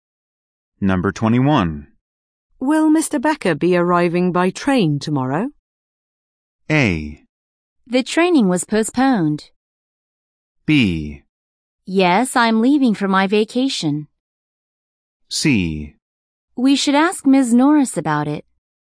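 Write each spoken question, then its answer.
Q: Will Mr. Becker be arriving by train tomorrow?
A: C: We should ask Ms. Norris about it.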